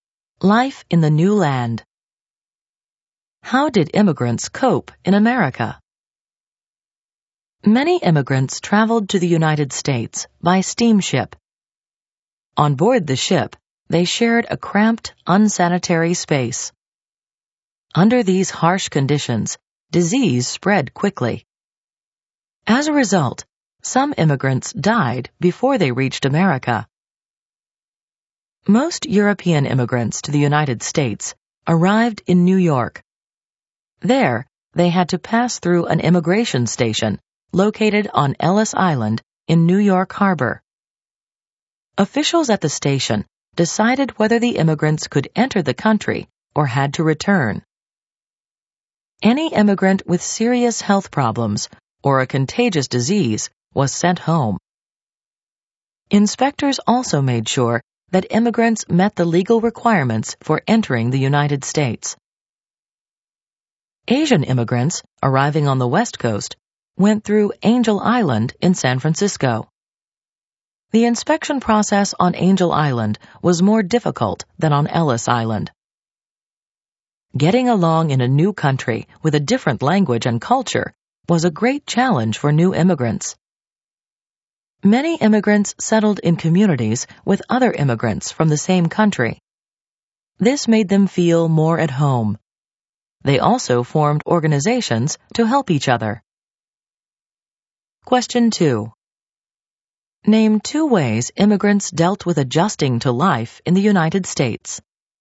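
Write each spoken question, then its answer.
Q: Name two ways immigrants dealt with adjusting to life in the United States.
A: They settled in communities with immigrants from the same country and formed organizations to help each other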